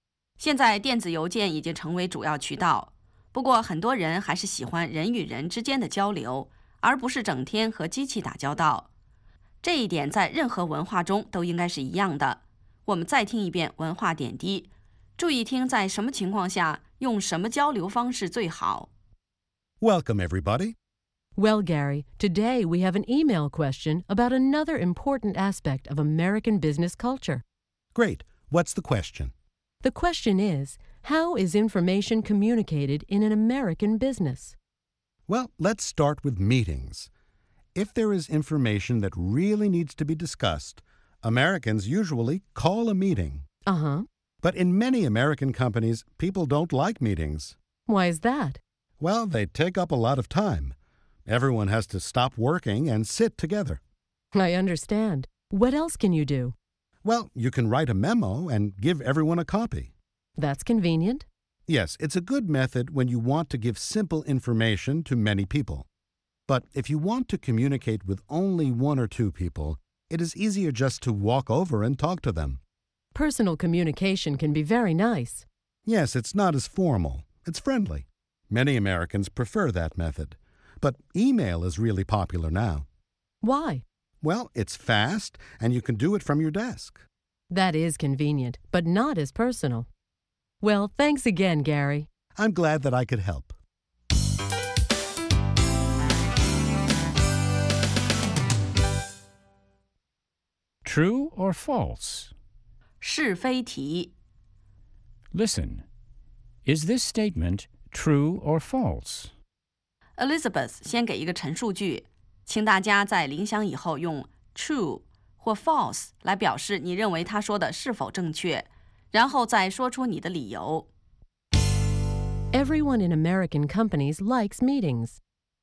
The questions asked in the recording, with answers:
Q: Everyone in American companies likes meetings.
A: False.Many people think that meetings take up too much time.